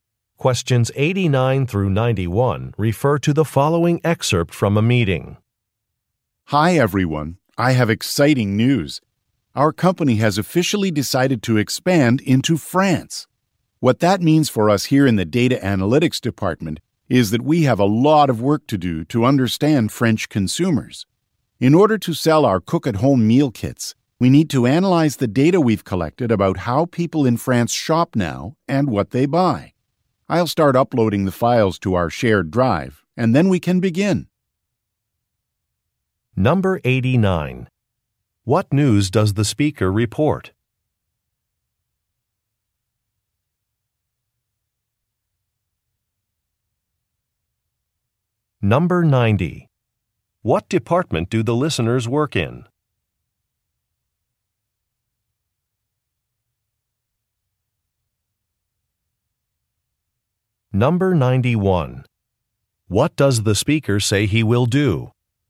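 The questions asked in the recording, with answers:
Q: What news does the speaker report?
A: The company is expanding into France

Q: What department do the listeners work in?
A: Data analytics

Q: What does the speaker say he will do?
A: Upload files to the shared drive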